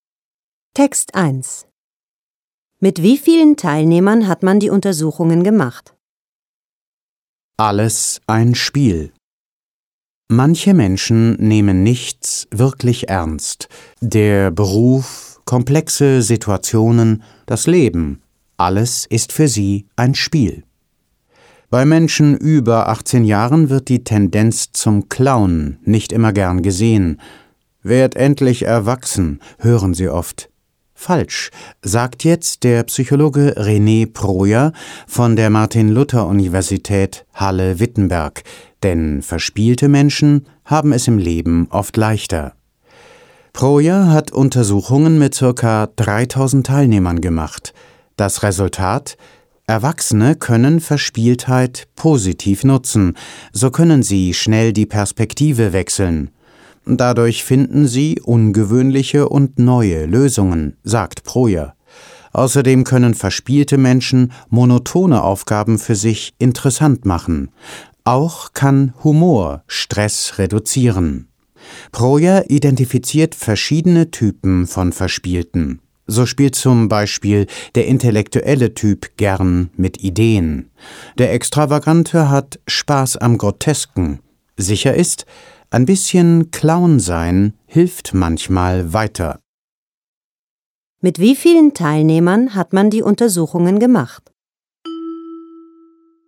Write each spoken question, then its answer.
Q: Mit wie vielen Teilnehmern hat man die Untersuchungen gemacht?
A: Mit circa 3000 Teilnehmern.